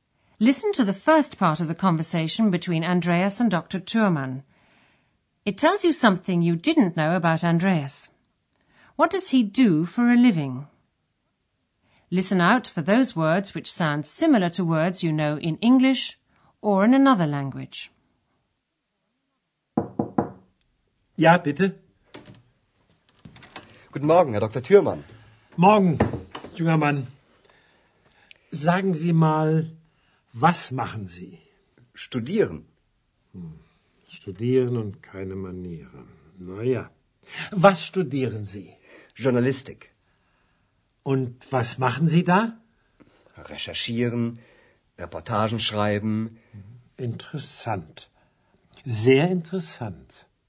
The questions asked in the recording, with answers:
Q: What does he do for a living?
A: Andreas is studying journalism.